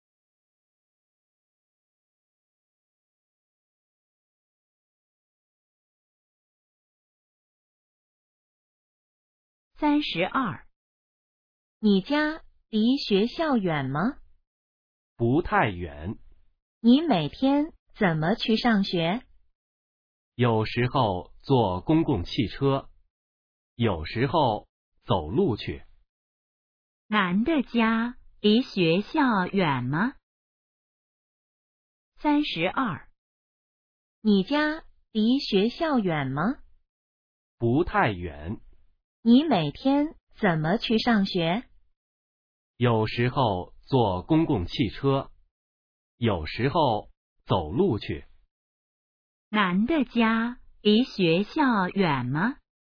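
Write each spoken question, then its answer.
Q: 男的家离学校远吗?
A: 不太远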